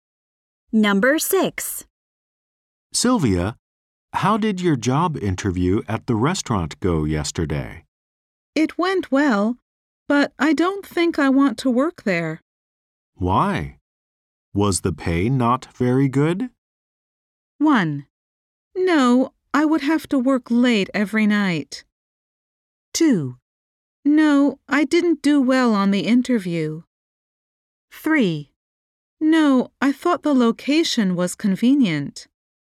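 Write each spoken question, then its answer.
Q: Why? Was the pay not very good?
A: 1: No, I would have to work late every night.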